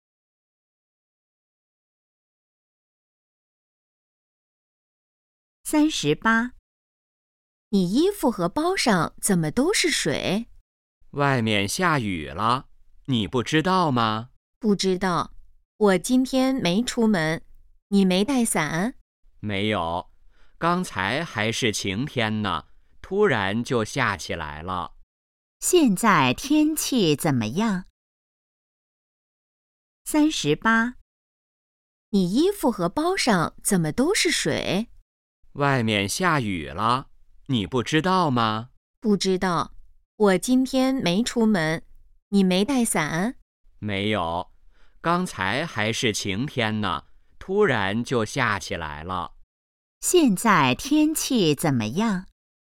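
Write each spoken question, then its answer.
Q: 现在天气怎么样?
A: 下雨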